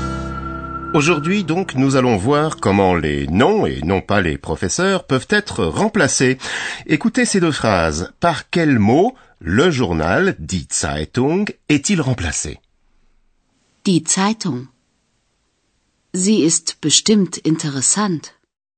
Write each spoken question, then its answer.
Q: Par quel mot le journal, die Zeitung, est-il remplacé?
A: Eh bien, le journal, die Zeitung, est remplacé par le pronom zi.